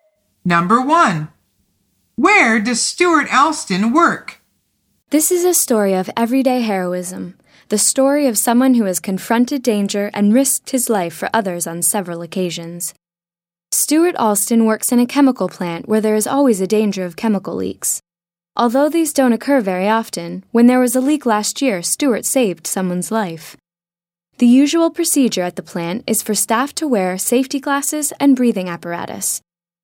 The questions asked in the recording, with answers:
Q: Where does Stuart Alston work?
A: The answer is in a chemical plant.